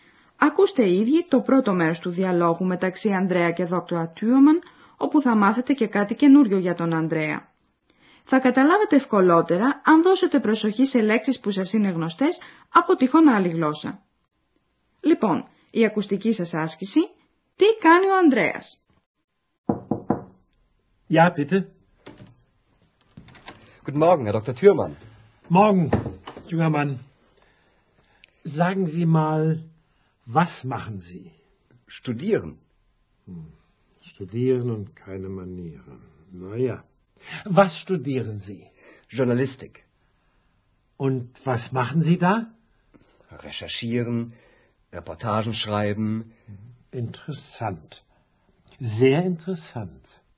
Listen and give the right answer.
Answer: Καταλάβατε από ακούσατε πως ο Ανδρέας σπουδάζει δημοσιογραφία.